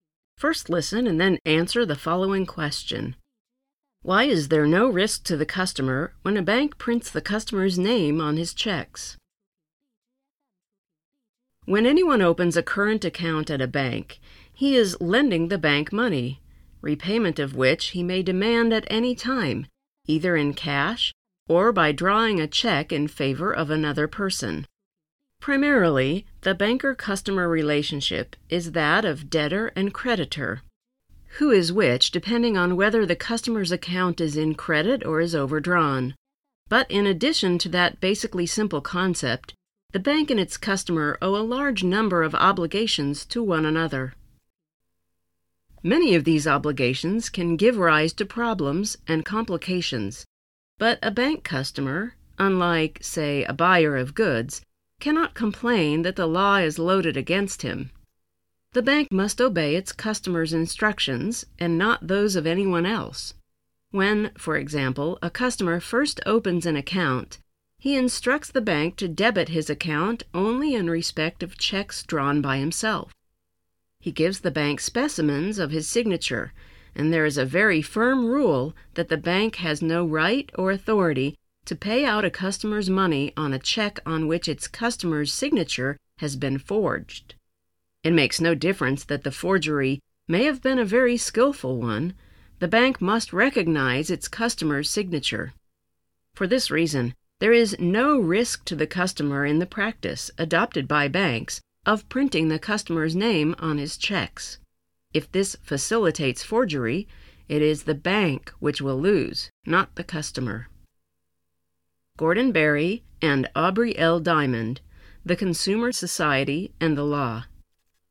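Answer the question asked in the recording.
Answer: Because the bank must recognize its customer's signature and, if forgery happens, the bank loses, not the customer.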